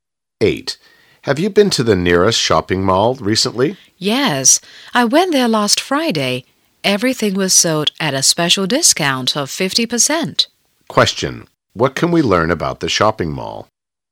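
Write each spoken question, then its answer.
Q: What can we learn about the shopping mall?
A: Everything was sold at half price last Friday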